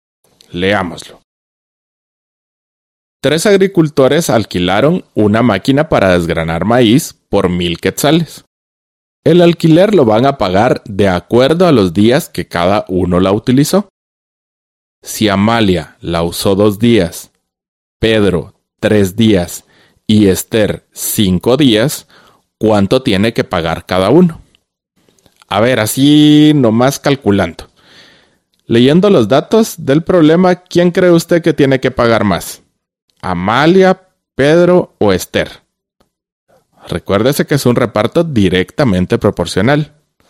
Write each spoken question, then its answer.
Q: Si Amalia la usó 2 días, Pedro 3 días y Esther 5 días, ¿cuánto tiene que pagar cada uno?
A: Amalia deberá pagar 200 quetzales, Pedro 300 quetzales y Esther 500 quetzales

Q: Leyendo los datos del problema, ¿quién cree usted que tiene que pagar más?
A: Va a ser Esther.